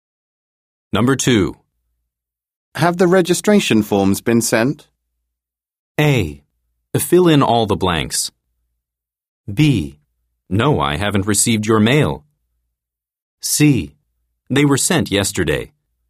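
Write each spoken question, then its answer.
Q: Have the registration forms been sent?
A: C: They were sent yesterday.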